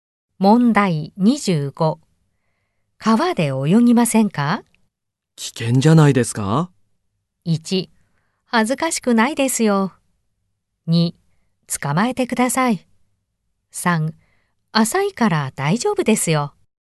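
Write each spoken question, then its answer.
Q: 川で泳ぎませんか?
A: 2: 浅いから大丈夫ですよ。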